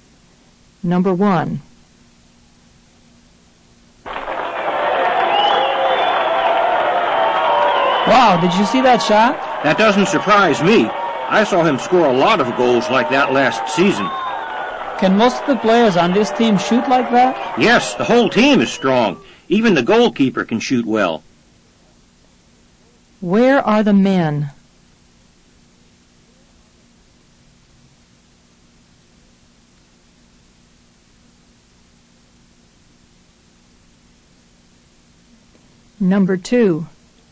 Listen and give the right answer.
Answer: Number 1 is A. Repeat. The men are at a soccer game.